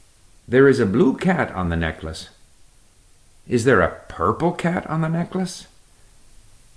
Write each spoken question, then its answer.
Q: Is there a purple cat on the necklace?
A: No, there's not. There is a blue cat on the necklace.